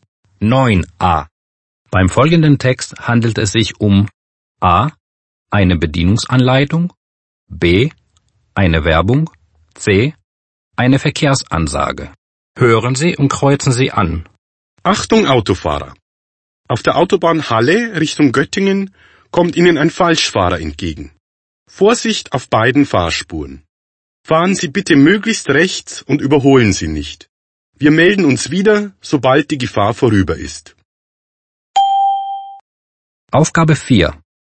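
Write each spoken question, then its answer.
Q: Beim folgenden Text handelt es sich um A. eine Bedienungsanleitung, B. eine Werbung, C. eine Verkehrsansage.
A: C: eine Verkehrsansage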